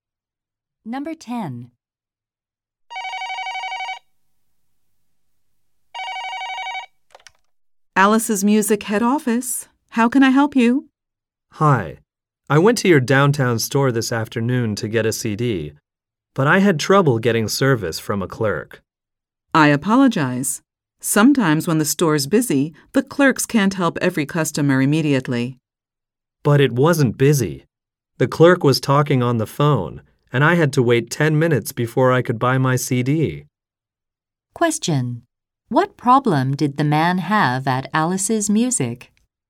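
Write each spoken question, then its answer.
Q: What problem did the man have at Alice's Music?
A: He had to wait because the clerk was on the phone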